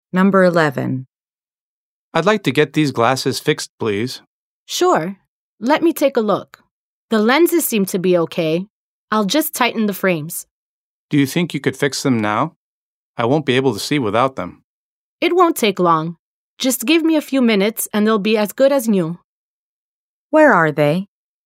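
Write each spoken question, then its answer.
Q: Where are they?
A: At an optician's (glasses repair shop)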